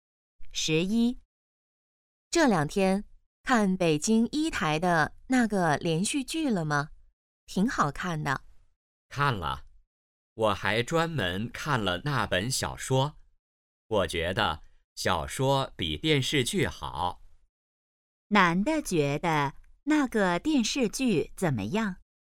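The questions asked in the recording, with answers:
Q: 男的觉得那个电视剧怎么样?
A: 不如小说好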